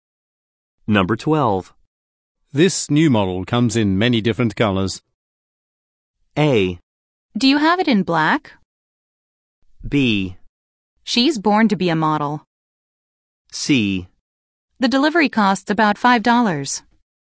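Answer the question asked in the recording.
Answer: A: Do you have it in black?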